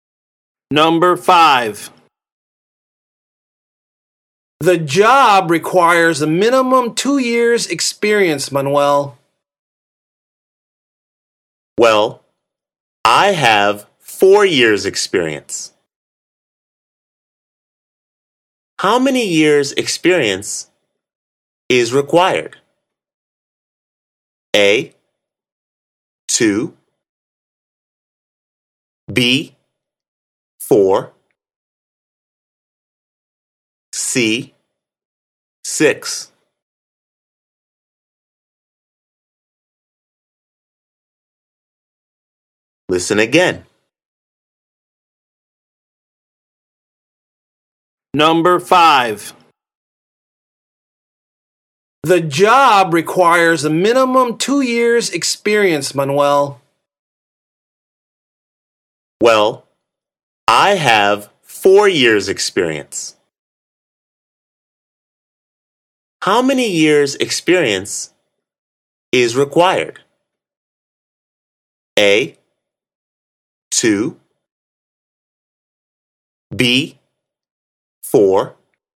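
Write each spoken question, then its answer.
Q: How many years' experience is required?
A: A: 2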